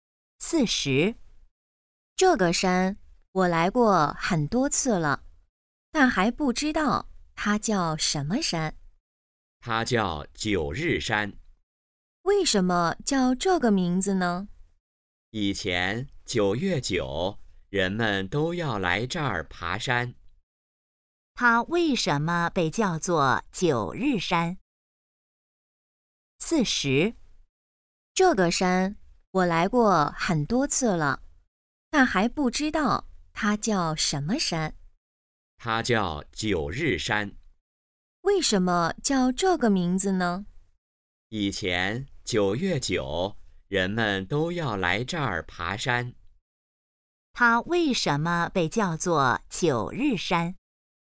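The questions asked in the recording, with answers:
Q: 它为什么被叫做九日山?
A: 以前9月9日人们都来这儿爬山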